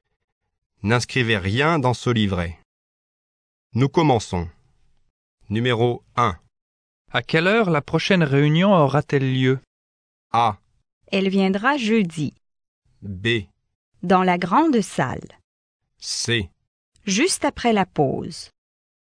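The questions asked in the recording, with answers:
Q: À quelle heure la prochaine réunion aura-t-elle lieu ?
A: C: Juste après la pause.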